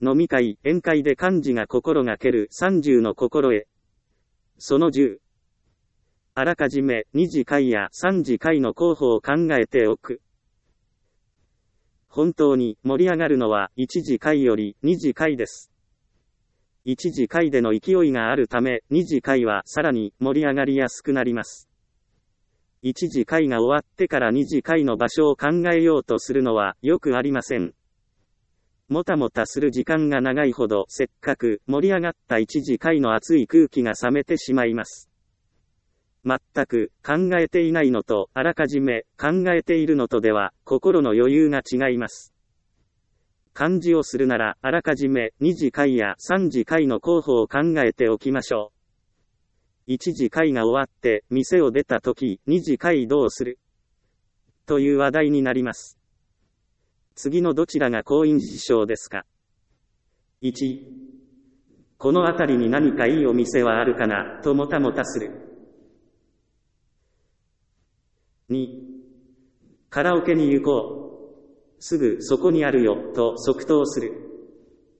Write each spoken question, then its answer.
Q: 次のどちらが好印象ですか ?1、この辺りに何かいいお店はあるかな、ともたもたする。 2、カラオケに行こう。すぐそこにあるよ、と即答する。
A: 当然、即答できた方が印象がいいですよね。